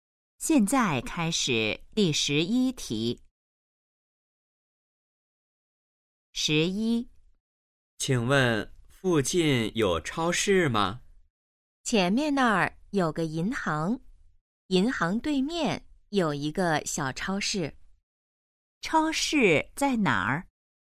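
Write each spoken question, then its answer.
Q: 超市在哪儿?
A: 银行对面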